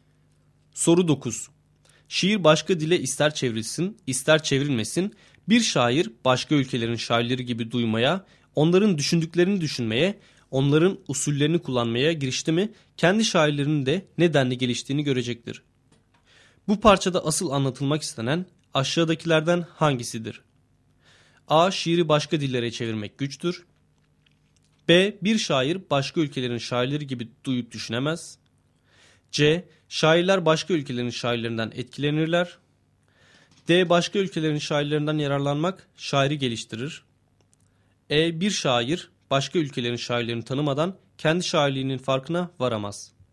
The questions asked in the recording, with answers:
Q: Bu parçada asıl anlatılmak istenen aşağıdakilerden hangisidir?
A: Doğru cevap D şıkkı.